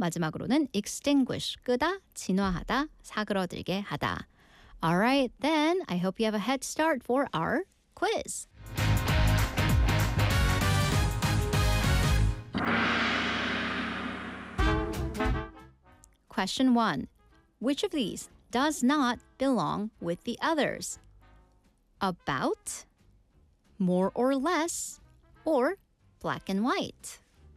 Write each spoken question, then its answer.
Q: Which of these does not belong with the others?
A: 확실한 흑과 백, black and white이 답이었습니다.